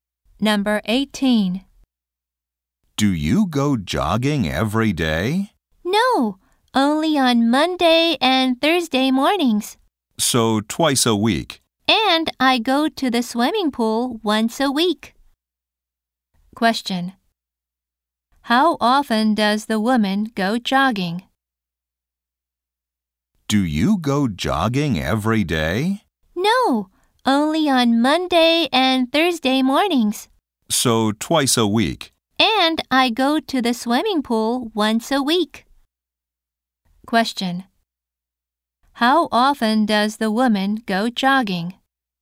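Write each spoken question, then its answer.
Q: How often does the woman go jogging?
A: Twice a week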